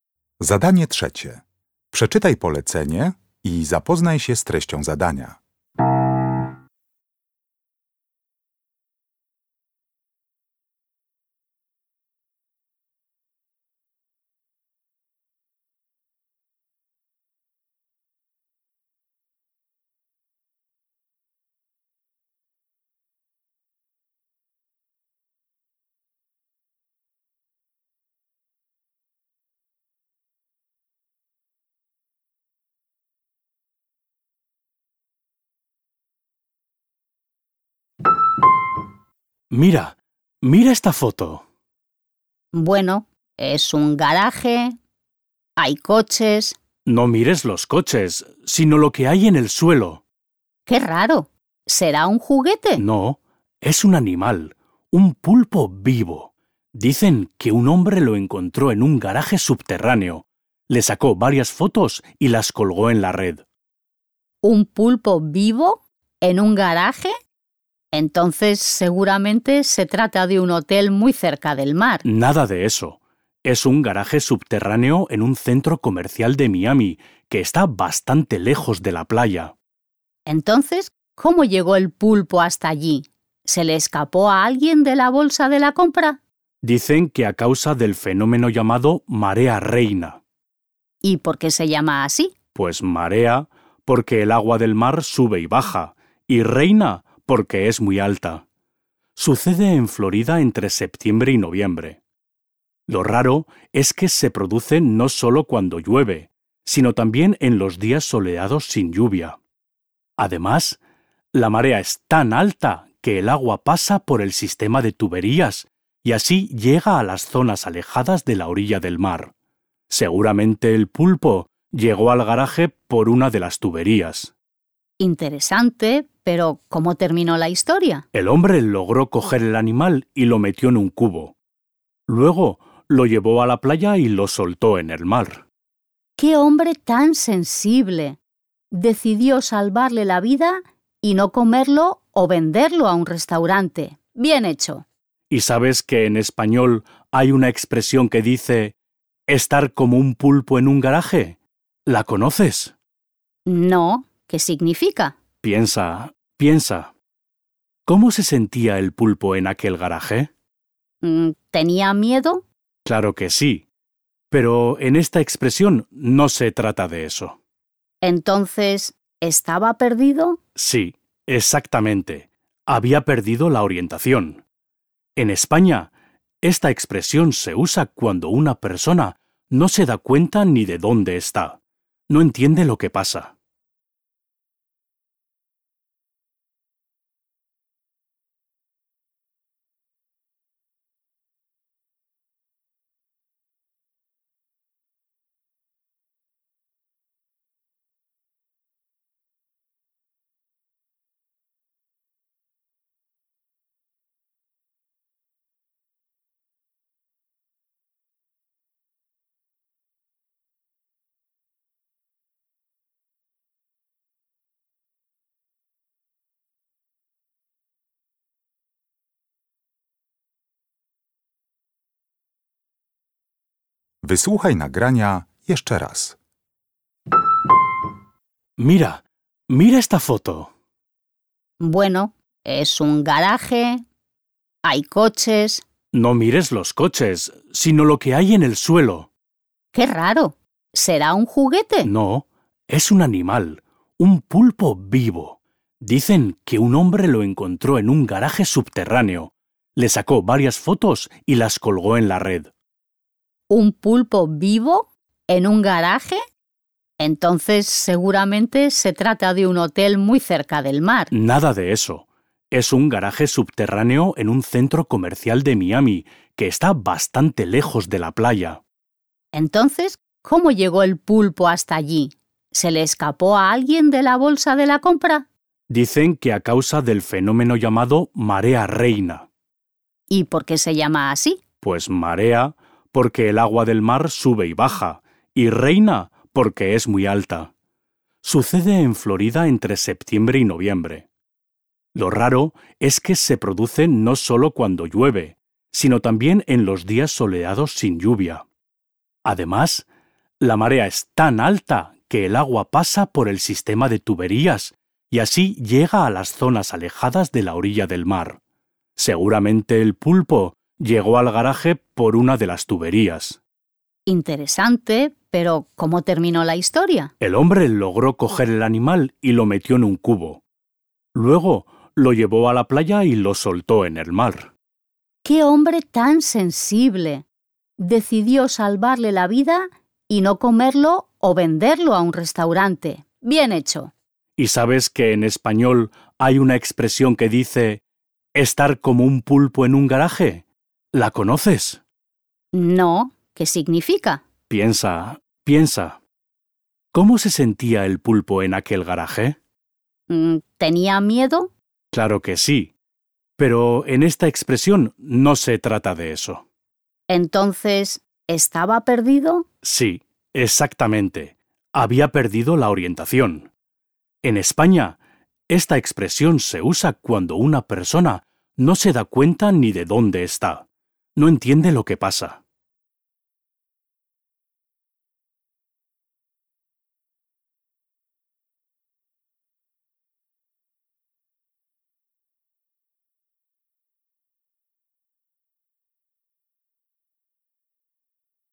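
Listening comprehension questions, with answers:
Uruchamiając odtwarzacz z oryginalnym nagraniem CKE usłyszysz dwukrotnie rozmowę dotyczącą ośmiornicy (el pulpo). Na podstawie informacji zawartych w nagraniu uzupełnij luki w zdaniach 3.1.–3.4., tak aby jak najbardziej precyzyjnie oddać sens wysłuchanego tekstu. Luki należy uzupełnić w języku hiszpańskim.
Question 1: El garaje subterráneo donde el hombre encontró el pulpo está situado en de Miami.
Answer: un centro comercial

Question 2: Lo sorprendente es que la marea reina se produce también cuando .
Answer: no llueve / hace sol

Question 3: El hombre que encontró el pulpo decidió , y eso le gustó mucho a la chica.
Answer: salvarle la vida (soltarlo en el mar)

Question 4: La expresión "estar como un pulpo en un garaje" significa que alguien está completamente .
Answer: perdido

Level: Poziom: podstawowy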